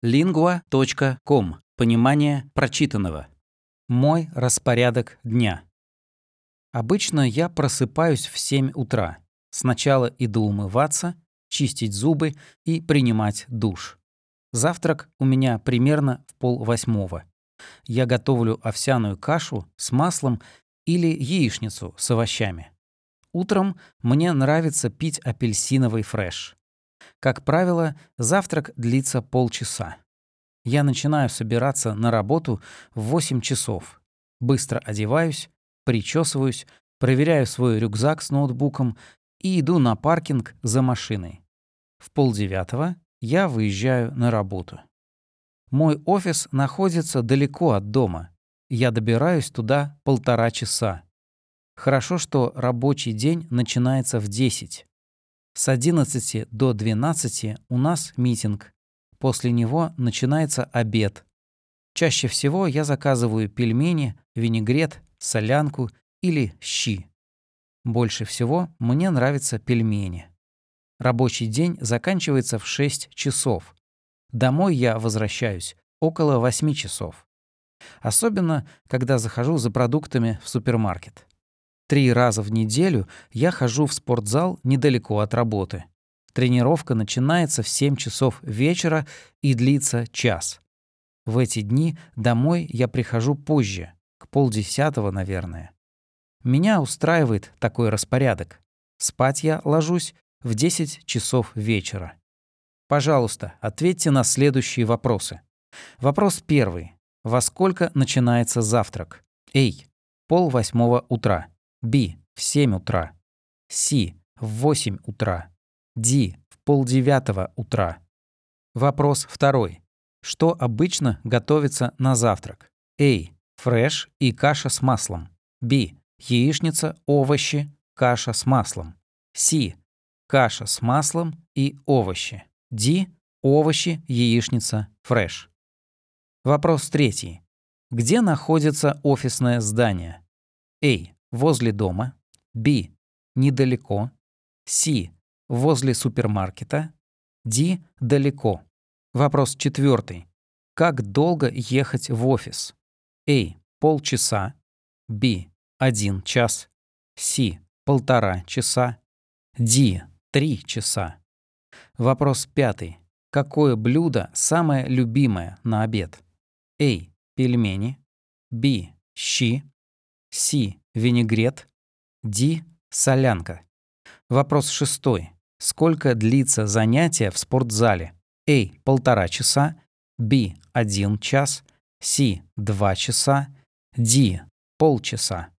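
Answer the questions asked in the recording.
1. A: 7:30 утра
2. B: Яичница, овощи, каша с маслом
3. D: Далеко
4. C: 1.5 часа
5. A: Пельмени
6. B: 1 час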